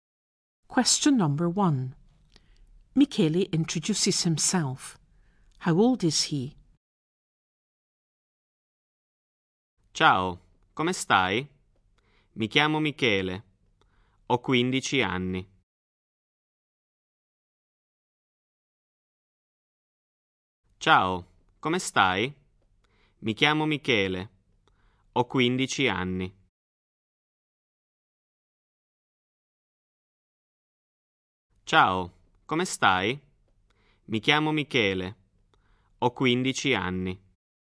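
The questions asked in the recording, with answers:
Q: How old is he?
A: 15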